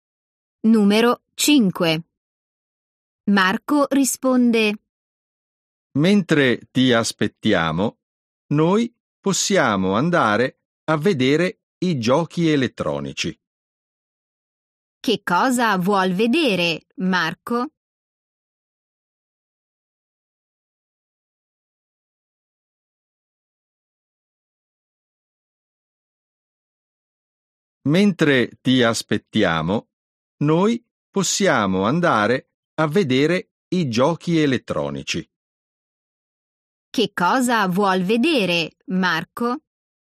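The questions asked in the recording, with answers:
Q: Che cosa vuol vedere, Marco?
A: i giochi elettronici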